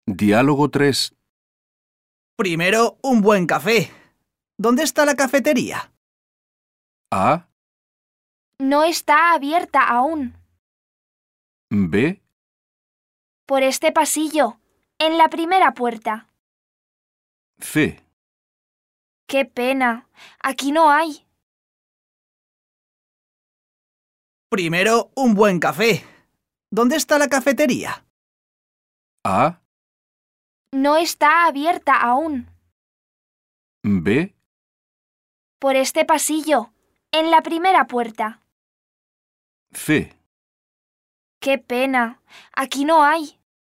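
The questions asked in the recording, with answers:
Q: Primero, un buen café. ¿Dónde está la cafetería?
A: B: Por este pasillo, en la primera puerta.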